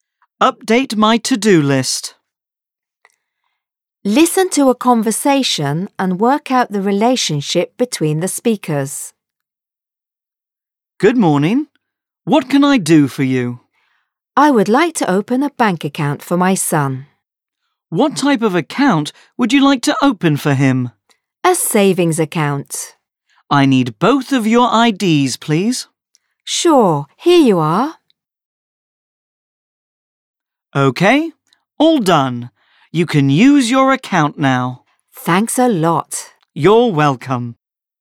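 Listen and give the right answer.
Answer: Bank clerk and customer (a parent)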